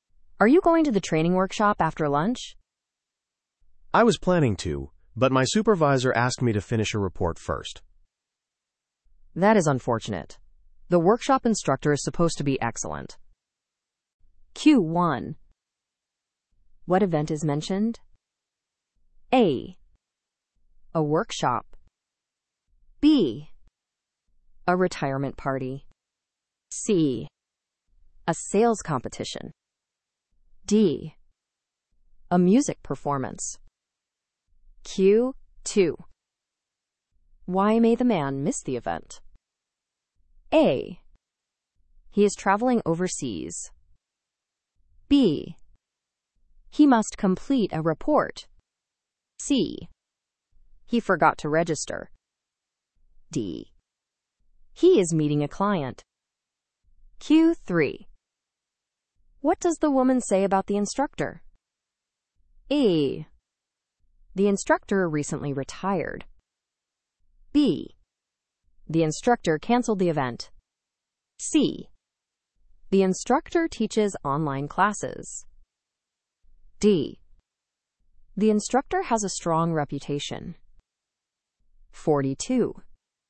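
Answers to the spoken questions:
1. A: A workshop.
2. B: He must complete a report.
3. D: The instructor has a strong reputation.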